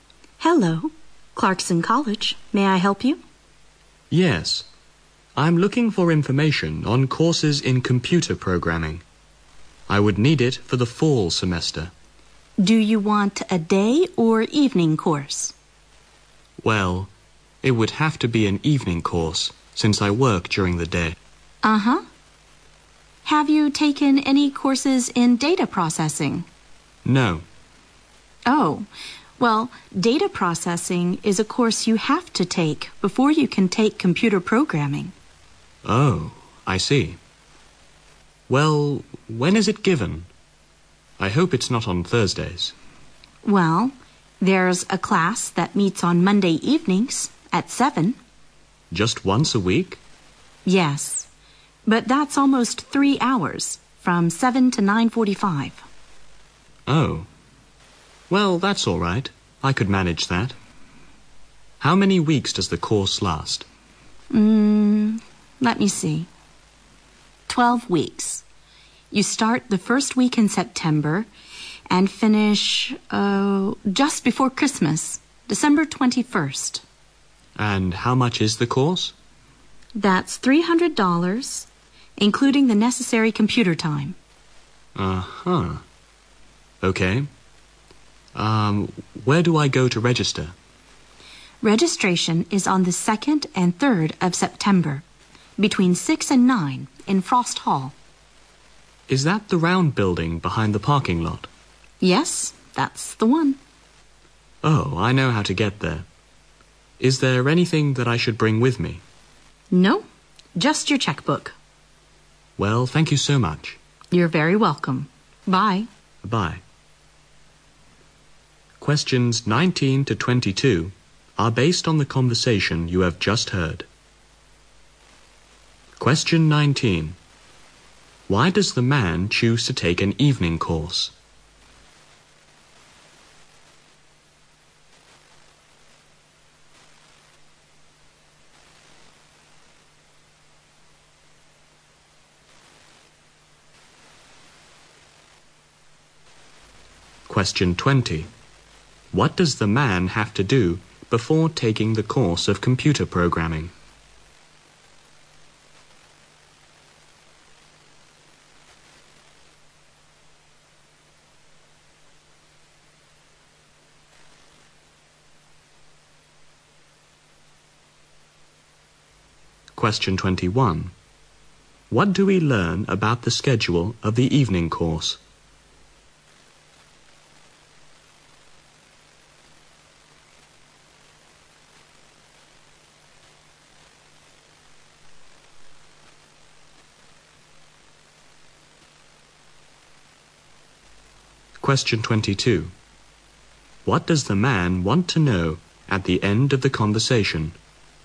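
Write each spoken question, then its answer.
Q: Why does the man choose to take an evening course?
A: He works during the day

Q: What does the man have to do before taking the course of computer programming?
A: Take a course in data processing

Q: What do we learn about the schedule of the evening course?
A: Monday evenings, 7 to 9:45, for 12 weeks

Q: What does the man want to know at the end of the conversation?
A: Whether he should bring anything when registering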